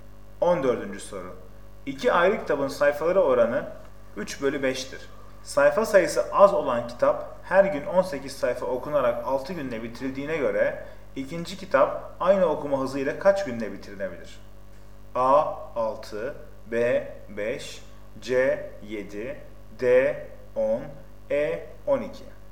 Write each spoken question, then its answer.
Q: Sayfa sayısı az olan kitap her gün 18 sayfa okunarak 6 günde bitirildiğine göre ikinci kitap aynı okuma hızıyla kaç günde bitirilebilir?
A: Doğru cevap D 10.